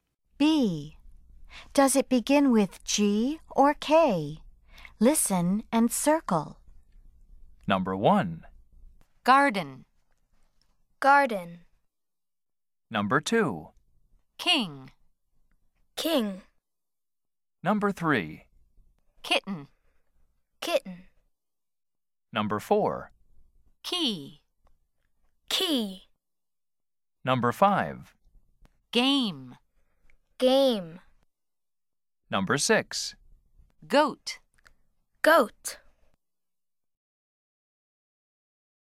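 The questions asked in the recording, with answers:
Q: Does it begin with G or K?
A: G: Garden

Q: Does it begin with G or K?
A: K: King

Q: Does it begin with G or K?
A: K: Kitten

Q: Does it begin with G or K?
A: K: Key

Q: Does it begin with G or K?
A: G: Game

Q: Does it begin with G or K?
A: G: Goat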